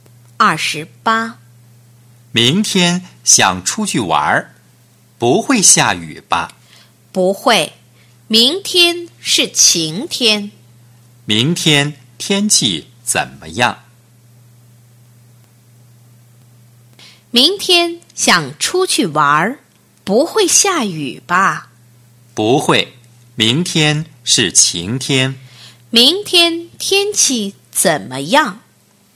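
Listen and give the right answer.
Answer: 晴天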